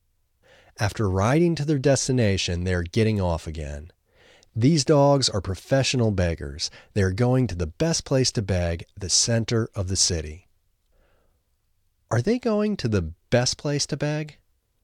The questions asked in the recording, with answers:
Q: Are they going to the best place to beg?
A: Yes, they are going to the best place to beg.